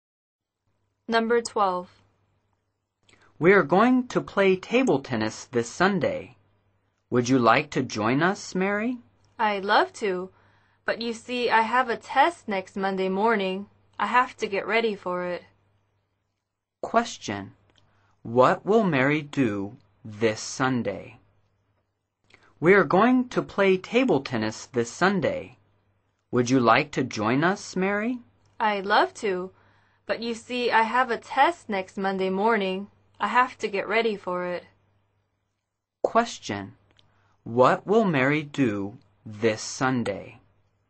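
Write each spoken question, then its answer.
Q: Question. What will Mary do this Sunday?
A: Get ready for a test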